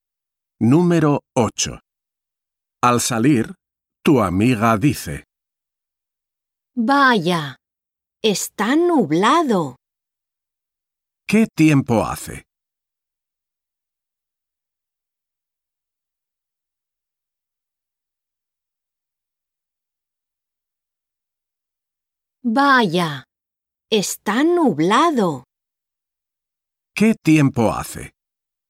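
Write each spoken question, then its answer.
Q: ¿Qué tiempo hace?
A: está nublado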